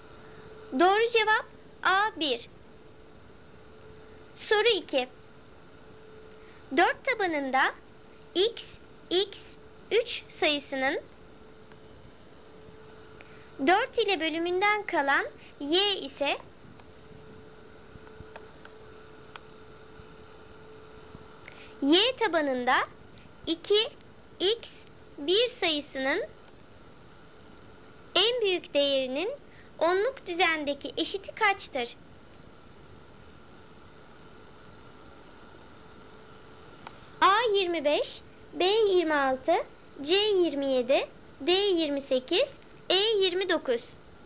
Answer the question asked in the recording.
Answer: Doğru cevap A25.